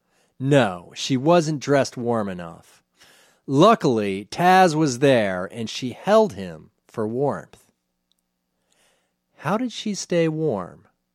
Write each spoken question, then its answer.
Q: How did she stay warm?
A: She held Taz for warmth.